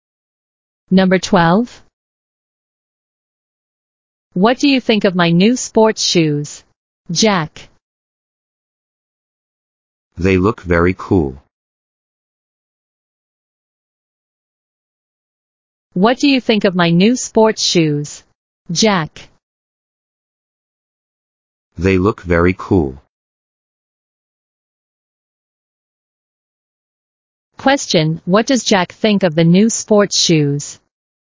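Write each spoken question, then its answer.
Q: Question, what does Jack think of the new sports shoes?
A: They look very cool.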